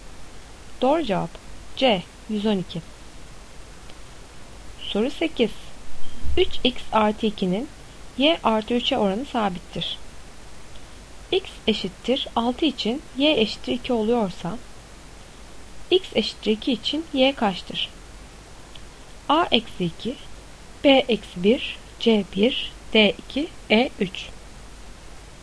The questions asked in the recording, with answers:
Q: X eşittir 6 için y eşittir 2 oluyorsa x eşittir 2 için y kaçtır?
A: Doğru cevap B eksi 1.